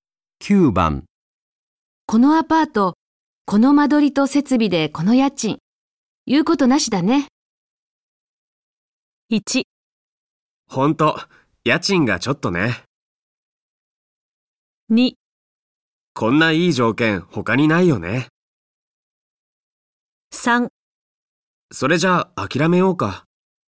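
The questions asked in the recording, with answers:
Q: このアパート、この間取りと設備でこの家賃。言うことなしだね。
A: 2: こんないい条件他にないよね。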